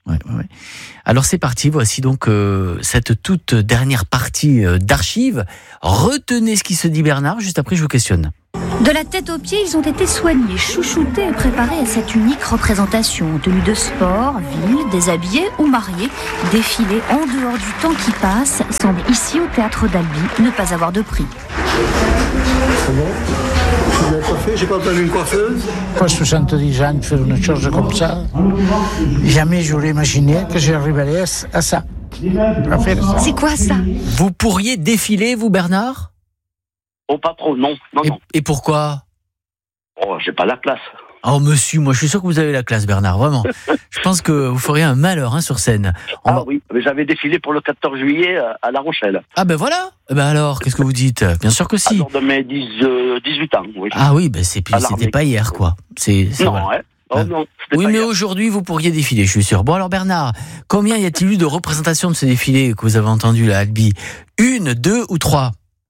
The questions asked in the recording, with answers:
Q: Bon, alors Bernard, combien y a-t-il eu de représentations de ce défilé que vous avez entendu, là, Albi ? Une, deux ou trois ?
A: Une, bravo.